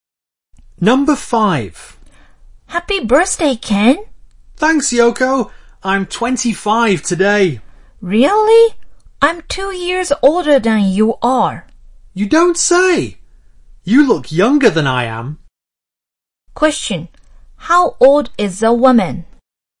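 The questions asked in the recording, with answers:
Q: How old is the woman?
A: 27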